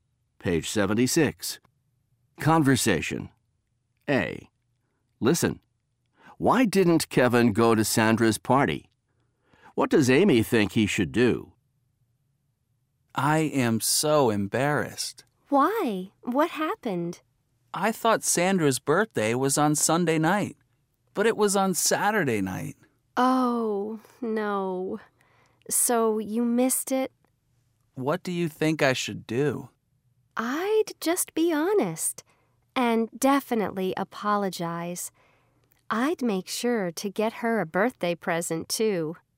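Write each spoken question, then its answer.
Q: Why didn't Kevin go to Sandra's party?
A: He thought her birthday party was on Sunday night, but it was on Saturday night.

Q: What does Amy think he should do?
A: Be honest, apologize, and get her a birthday present.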